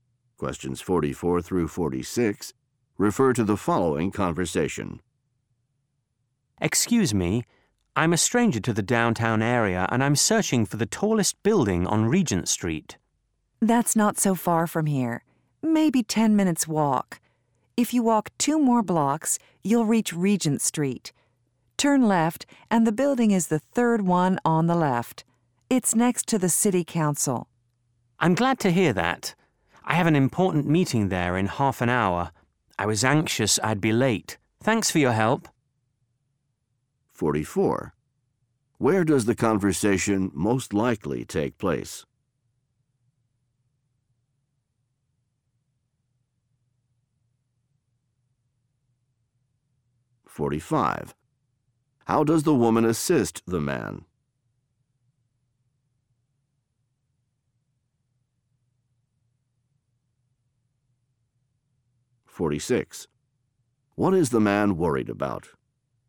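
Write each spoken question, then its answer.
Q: How does the woman assist the man?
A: She gives him directions

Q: What is the man worried about?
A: Being late for a meeting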